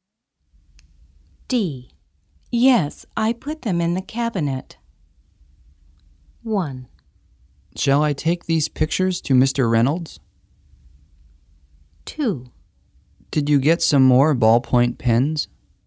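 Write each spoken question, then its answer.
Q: Yes, I put them in the cabinet.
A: 2: Did you get some more ballpoint pens?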